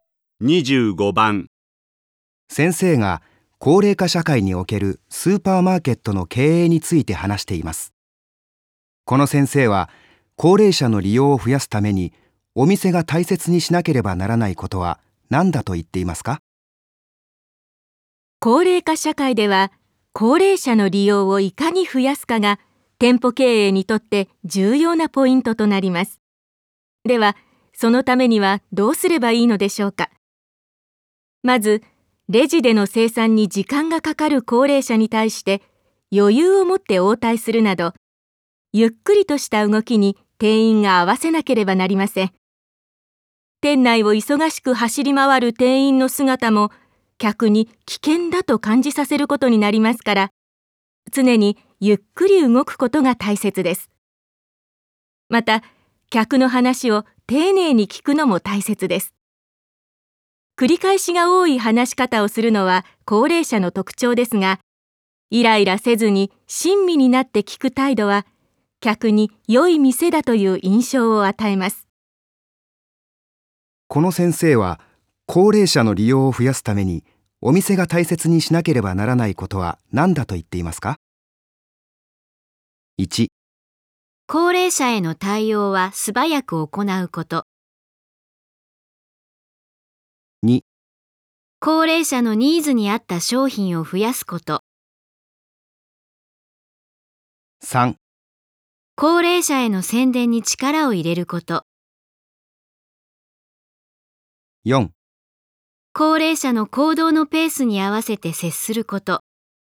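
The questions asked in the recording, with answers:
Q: この先生は高齢者の利用を増やすためにお店が大切にしなければならないことは何だと言っていますか?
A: 4: 高齢者の行動のペースに合わせて接すること。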